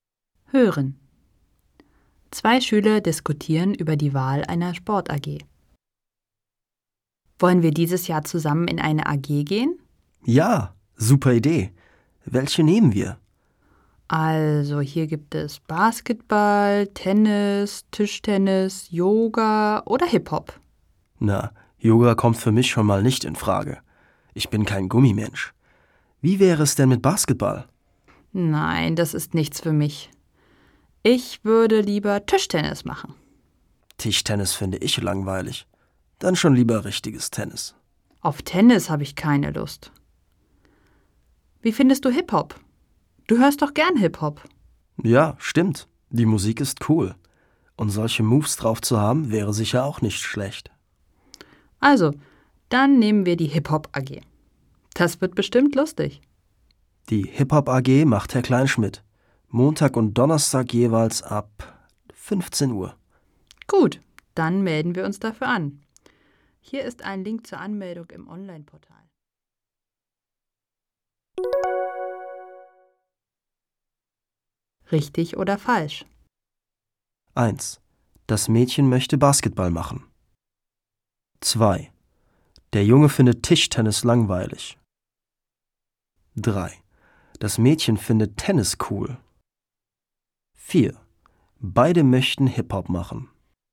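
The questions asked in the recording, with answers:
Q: Beide möchten Hip-Hop machen.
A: richtig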